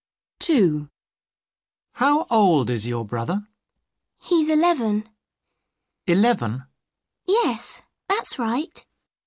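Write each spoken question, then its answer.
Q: How old is your brother?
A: 11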